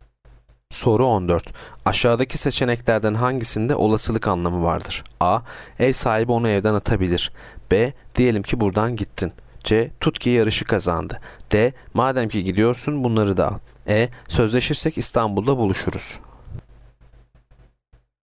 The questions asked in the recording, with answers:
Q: Aşağıdaki seçeneklerden hangisinde olasılık anlamı vardır?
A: Yanıt A. Ev sahibi onu evden atabilir.